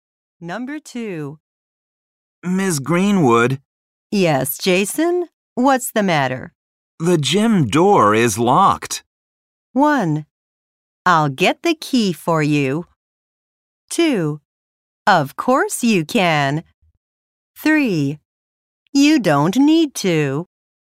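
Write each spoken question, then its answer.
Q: The gym door is locked.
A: 1: I'll get the key for you.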